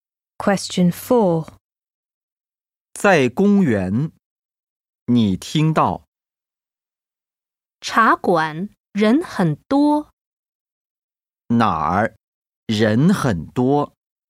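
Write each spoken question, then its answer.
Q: 哪儿人很多?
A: 茶馆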